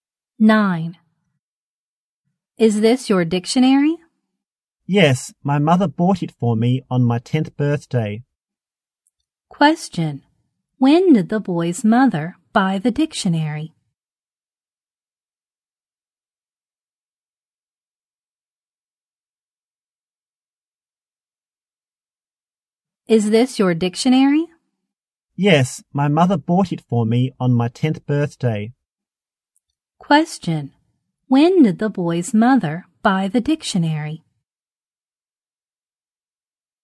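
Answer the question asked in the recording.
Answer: On his 10th birthday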